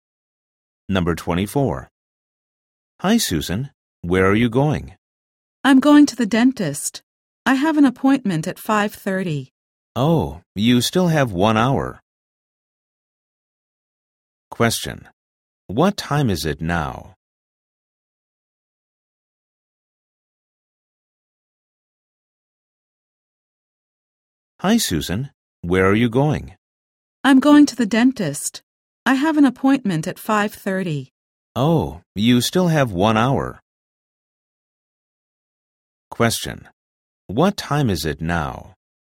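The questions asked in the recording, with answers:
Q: What time is it now?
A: 4:30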